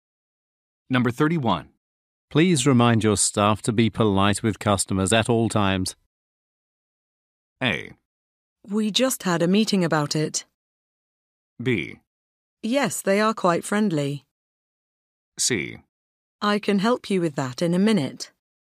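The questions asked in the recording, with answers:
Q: Please remind your staff to be polite with customers at all times.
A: A: We just had a meeting about it.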